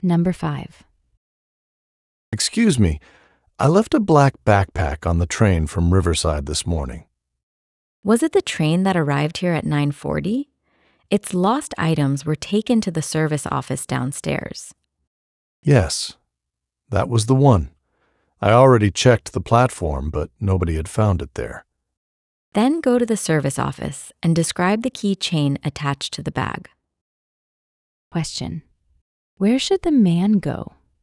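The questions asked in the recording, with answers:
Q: Question: Where should the man go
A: To the service office downstairs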